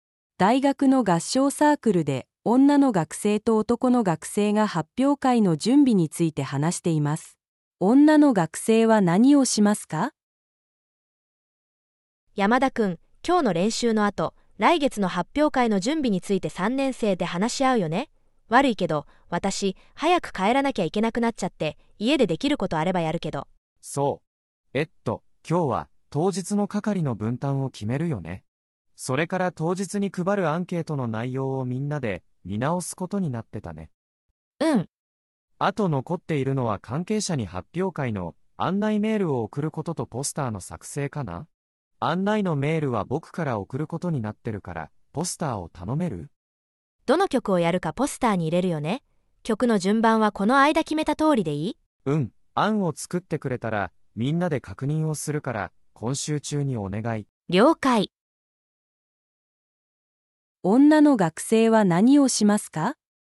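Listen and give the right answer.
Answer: ポスターを作る

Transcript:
大学の合唱サークルで女の学生と男の学生が発表会の準備について話しています。女の学生は何をしますか。
女:山田君、今日の練習の後、来月の発表会の準備について3年生で話し合うよね?悪いけど、私、早く帰らなきゃいけなくなっちゃって...家でできることあればやるけど...。
男:そう。えっと、今日は当日の係の分担を決めるよね?それから当日に配るアンケートの内容をみんなで見直すことになってたね。
女:うん。
男:あと残っているのは関係者に発表会の案内メールを送ることとポスターの作成かな?案内のメールは僕から送ることになってるからポスターを頼める?
女:どの曲をやるかポスターに入れるよね?曲の順番はこの間決めた通りでいい?
男:うん、案を作ってくれたらみんなで確認をするから今週中にお願い。
女:了解。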